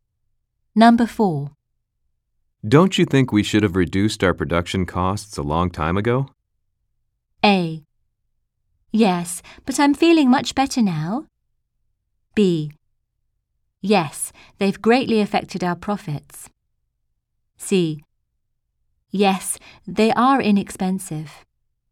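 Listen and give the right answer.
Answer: B: Yes, they've greatly affected our profits.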